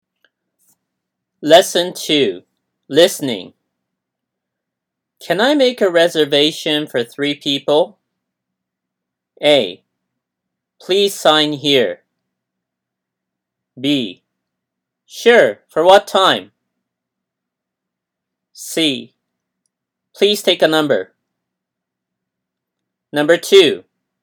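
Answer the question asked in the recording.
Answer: B: Sure, for what time?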